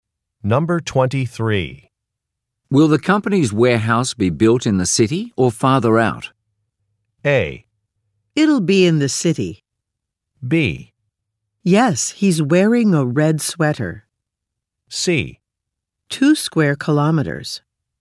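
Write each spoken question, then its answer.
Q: Will the company's warehouse be built in the city or farther out?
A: A: It'll be in the city.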